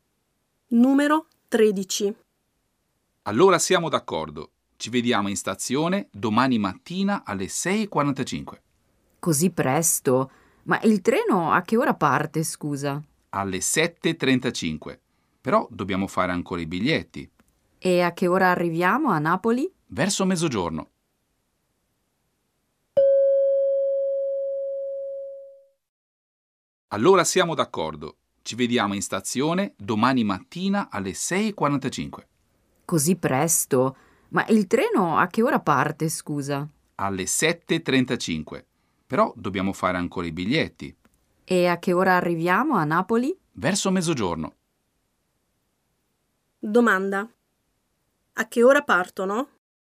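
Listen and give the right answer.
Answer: Alle 7:35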